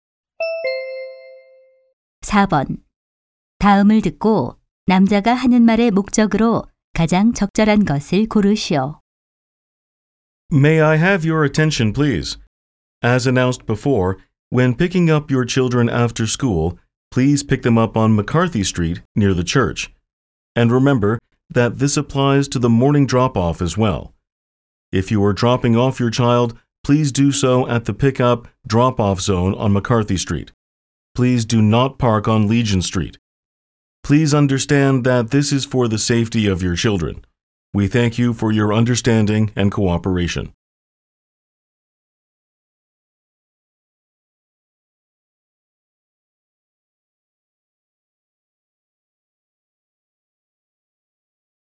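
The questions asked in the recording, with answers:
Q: 다음을 듣고 남자가 하는 말의 목적으로 가장 적절한 것을 고르시오.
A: 자녀 등하교 시 승하차 장소(McCarthy Street)를 안내하려고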